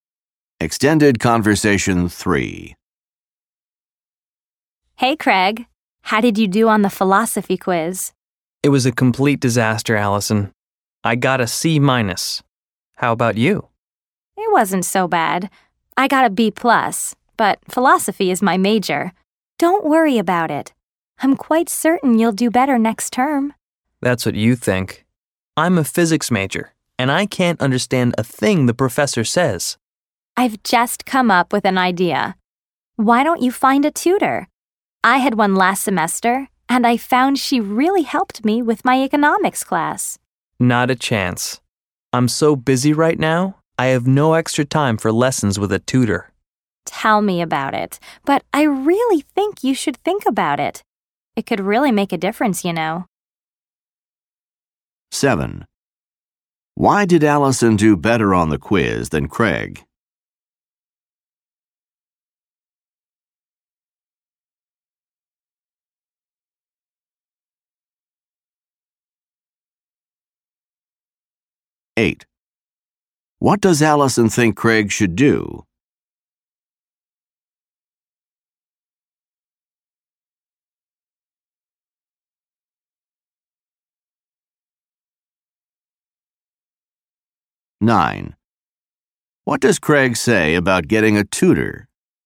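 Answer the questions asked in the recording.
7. Philosophy is her major
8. Find a tutor
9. He has no extra time for it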